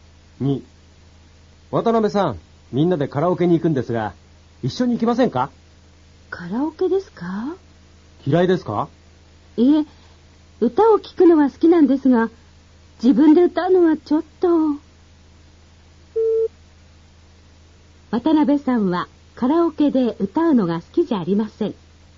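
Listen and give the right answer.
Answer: 正しい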